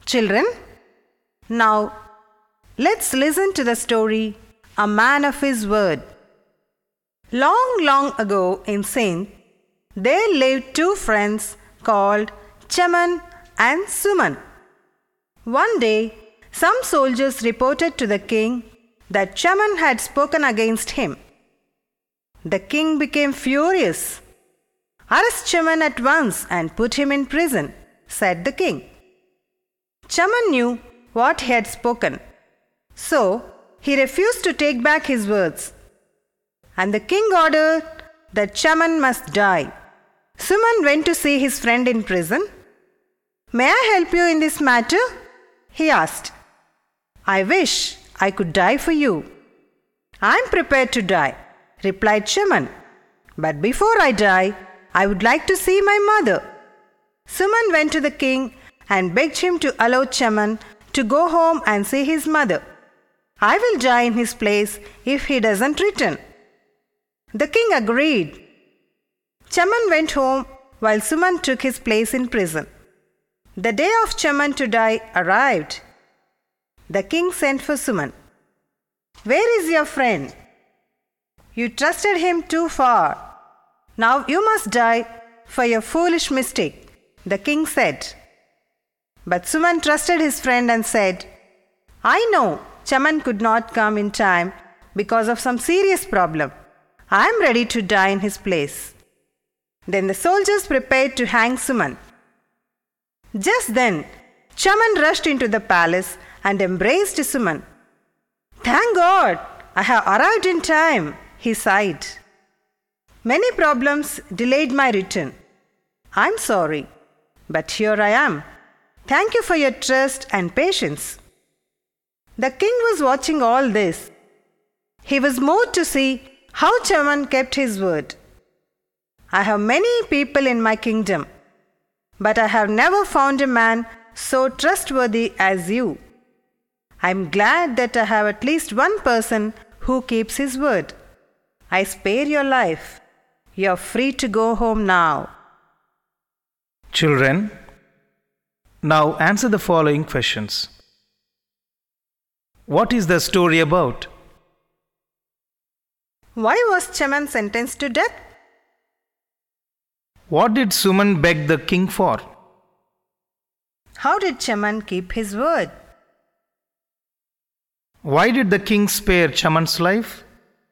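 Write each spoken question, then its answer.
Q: What is the story about?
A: Two friends, Chaman and Suman, and how Chaman kept his word

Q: Why was Chaman sentenced to death?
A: He had spoken against the king and refused to take back his words

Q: What did Suman beg the king for?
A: To let Chaman go home to see his mother, with Suman dying in his place if he didn't return

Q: How did Chaman keep his word?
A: He came back in time to die, despite many problems

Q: Why did the king spare Chaman's life?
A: He was moved by how trustworthy Chaman was in keeping his word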